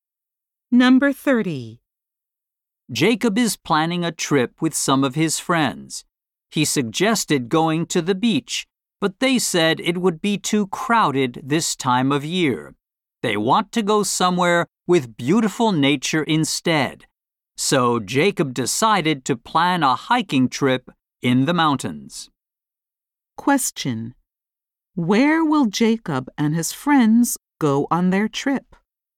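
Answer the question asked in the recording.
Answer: Hiking in the mountains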